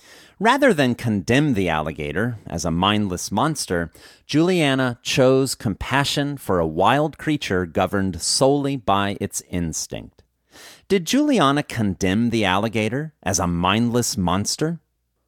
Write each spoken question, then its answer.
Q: Did Juliana condemn the alligator as a mindless monster?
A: No, Juliana didn't condemn the alligator as a mindless monster.